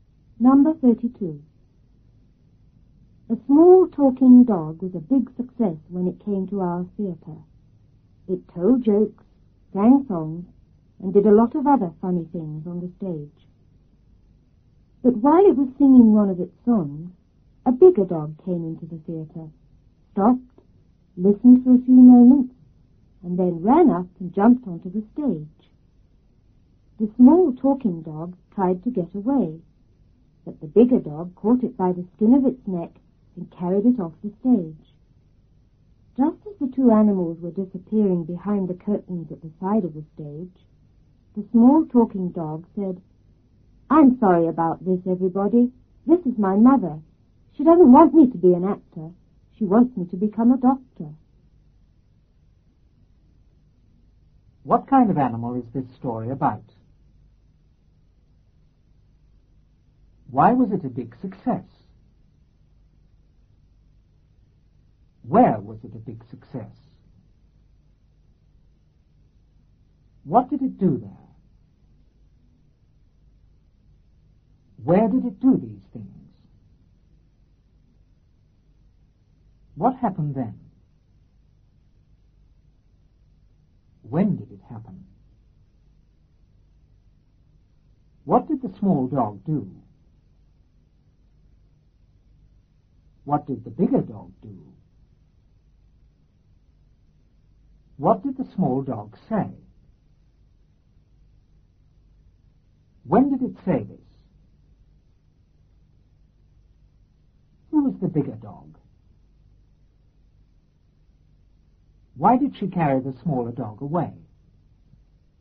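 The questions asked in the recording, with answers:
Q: What kind of animal is this story about?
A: A small talking dog

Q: Where was it a big success?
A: In our theater

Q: What did it do there?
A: It told jokes, sang songs, and did a lot of other funny things

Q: Where did it do these things?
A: On the stage

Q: What happened then?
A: A bigger dog came into the theater and jumped onto the stage

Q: When did it happen?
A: While the small dog was singing one of its songs

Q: What did the small dog do?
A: It tried to get away

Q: What did the bigger dog do?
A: It caught the small dog by the skin of its neck and carried it off the stage

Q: What did the small dog say?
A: "I'm sorry about this, everybody. This is my mother. She doesn't want me to be an actor. She wants me to become a doctor."

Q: When did it say this?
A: Just as the two animals were disappearing behind the curtains at the side of the stage

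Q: Who was the bigger dog? Why did she carry the smaller dog away?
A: The small dog's mother; she didn't want it to be an actor but a doctor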